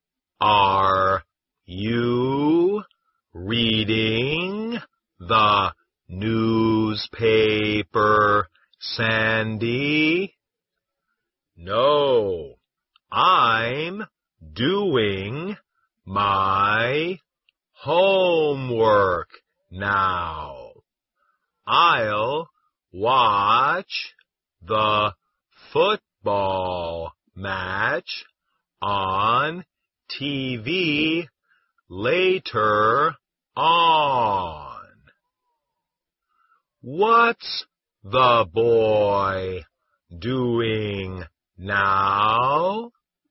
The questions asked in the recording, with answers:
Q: What's the boy doing now?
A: He's doing his homework.